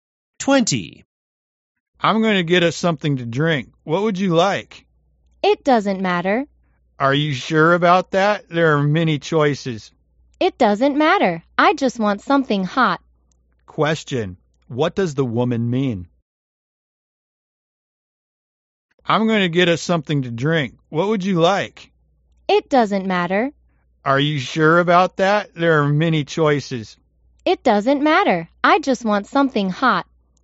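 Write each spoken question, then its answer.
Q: What does the woman mean?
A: She doesn't mind which drink, as long as it's hot.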